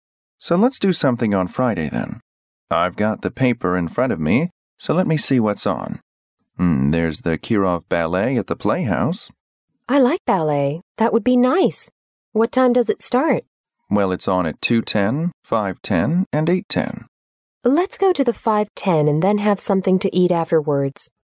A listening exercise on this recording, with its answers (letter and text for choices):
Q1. What do the speakers plan to do on Friday?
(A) Watch a ballet performance.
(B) Write a paper.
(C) Go to a play.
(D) Dine out at lunch time.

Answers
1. (A) Watch a ballet performance.

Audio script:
M: So, let's do something on Friday then. I've got the paper in front of me so let me see what's on. Mm... there's the Kirov Ballet at the Playhouse.
W: I like ballet. That would be nice. What time does it start?
M: Well, it's on at 2:10, 5:10 and 8:10.
W: Let's go to the 5:10 and then have something to eat afterwards.